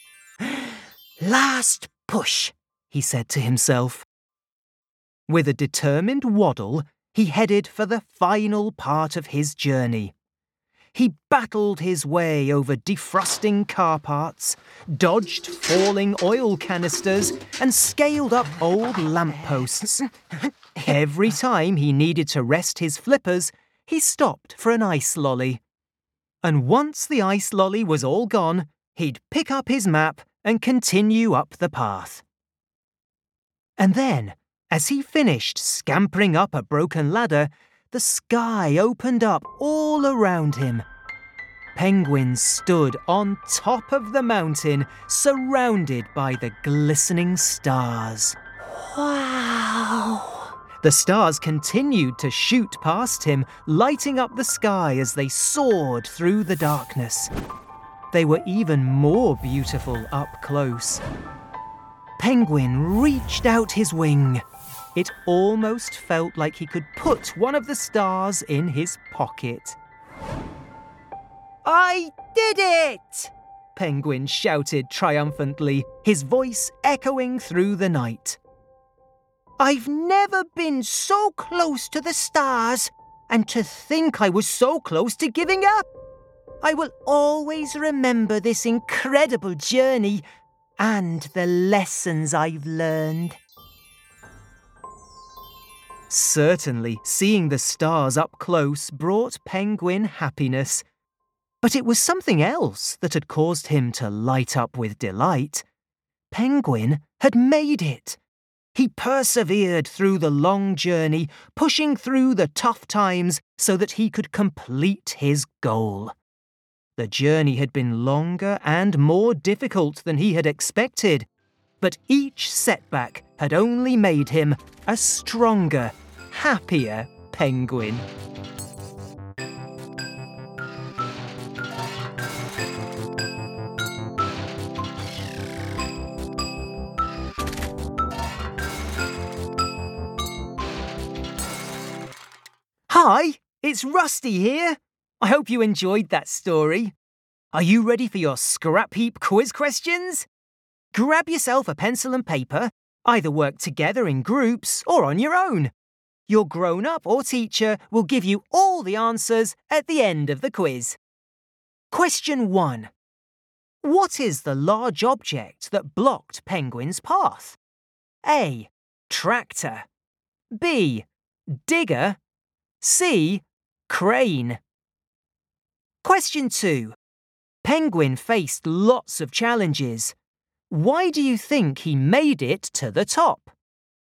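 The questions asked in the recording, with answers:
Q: Penguin faced lots of challenges. Why do you think he made it to the top?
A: He kept going and didn't give up.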